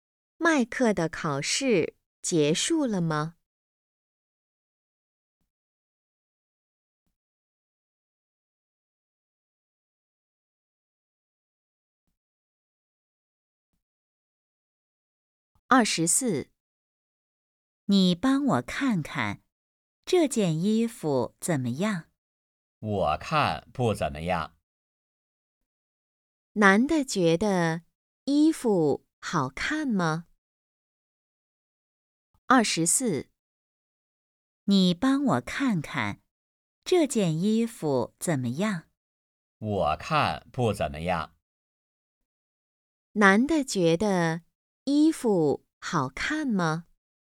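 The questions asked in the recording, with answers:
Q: 男的觉得衣服好看吗?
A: 不好看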